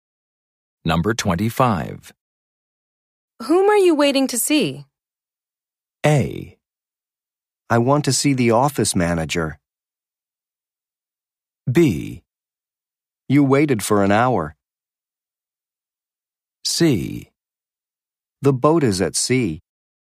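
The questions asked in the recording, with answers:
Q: Whom are you waiting to see?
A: A: I want to see the office manager.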